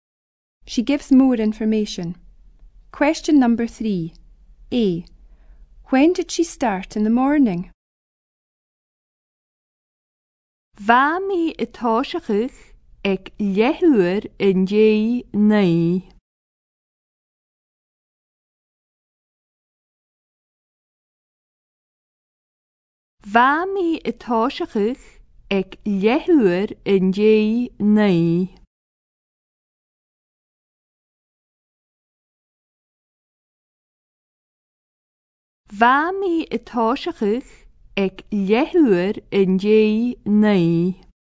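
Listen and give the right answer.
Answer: At nine o'clock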